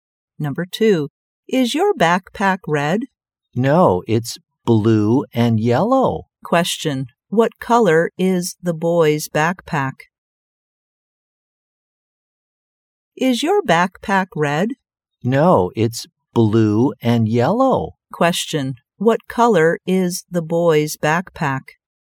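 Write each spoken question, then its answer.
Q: What color is the boy's backpack?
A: Blue and yellow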